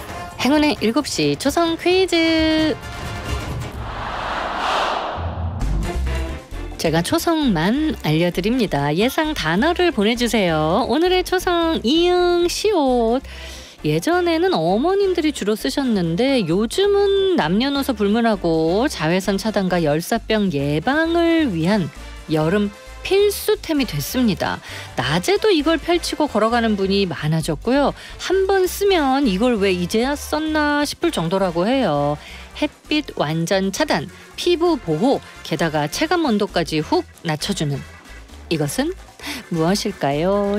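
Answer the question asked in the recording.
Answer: 양산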